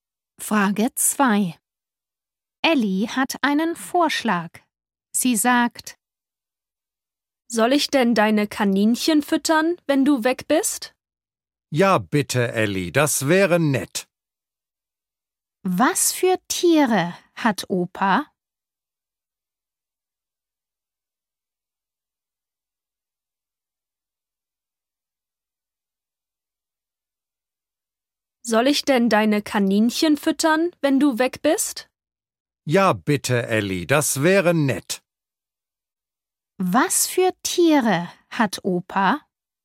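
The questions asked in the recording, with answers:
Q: Was für Tiere hat Opa?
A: Kaninchen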